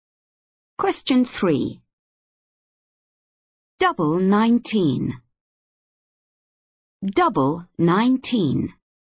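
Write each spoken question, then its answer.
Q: Double 19.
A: 38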